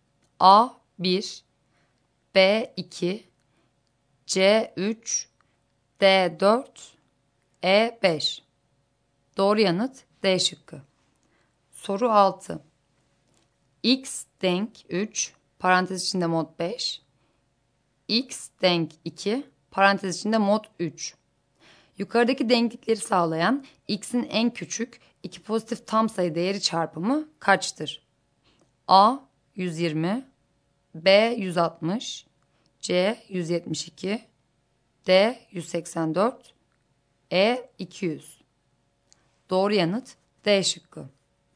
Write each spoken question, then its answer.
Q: X denk 3 parantez içinde mod 5 x denk 2 parantez içinde mod 3 Yukarıdaki denklikleri sağlayan x'in en küçük iki pozitif tam sayı değeri çarpımı kaçtır?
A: Doğru yanıt D şıkkı.